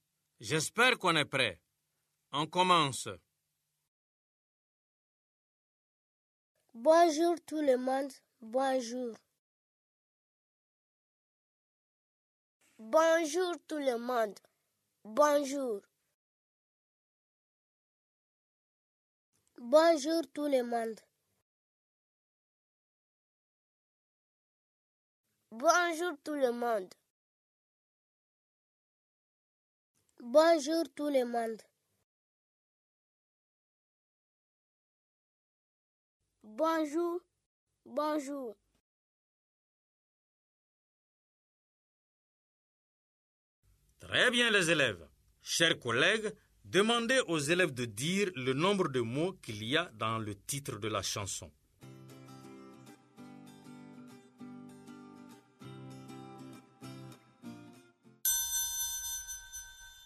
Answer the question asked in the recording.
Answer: Bravo les élèves, j'espère que vous avez trouvé quatre mots dans le titre.